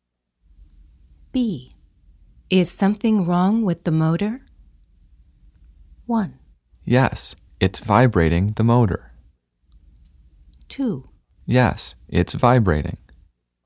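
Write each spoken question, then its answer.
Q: Is something wrong with the motor?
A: 2: Yes, it's vibrating.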